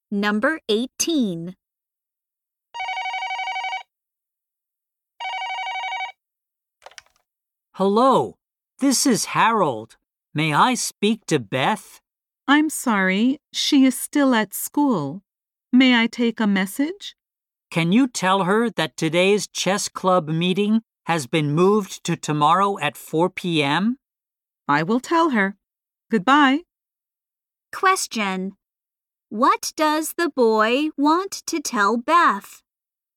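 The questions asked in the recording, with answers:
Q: What does the boy want to tell Beth?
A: The chess club meeting has been moved to tomorrow at 4 p.m.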